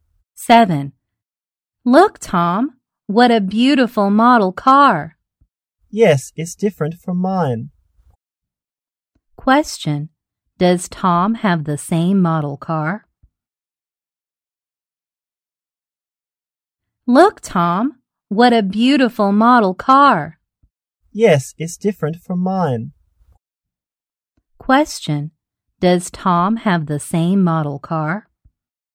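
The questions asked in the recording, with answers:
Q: Does Tom have the same model car?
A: No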